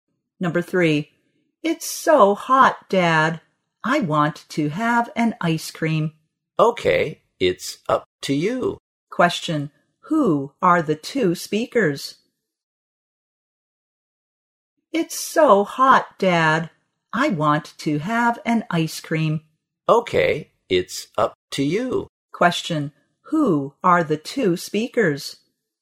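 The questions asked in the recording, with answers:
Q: who are the two speakers?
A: Father and child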